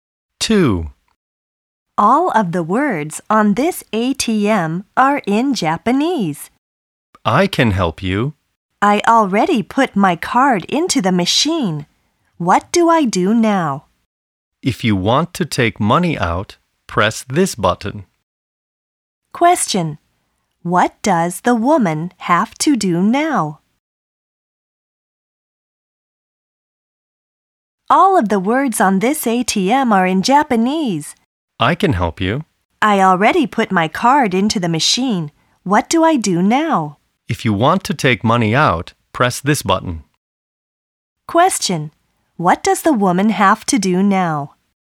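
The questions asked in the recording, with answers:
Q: What does the woman have to do now?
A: Press the button to take money out.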